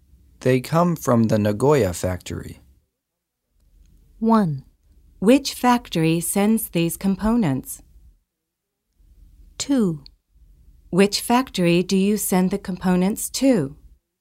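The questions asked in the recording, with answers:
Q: They come from the Nagoya factory.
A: 1: Which factory sends these components?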